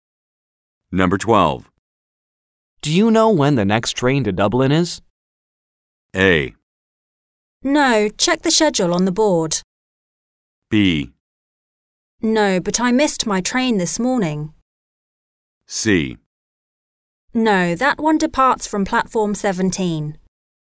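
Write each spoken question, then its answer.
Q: Do you know when the next train to Dublin is?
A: A: No, check the schedule on the board.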